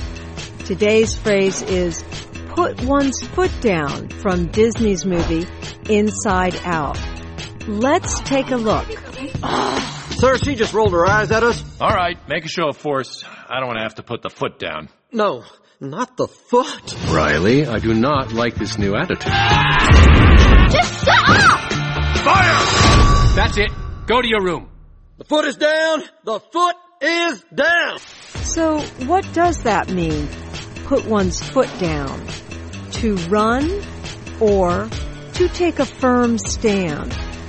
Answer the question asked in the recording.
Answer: To put one's foot down means to take a firm stand.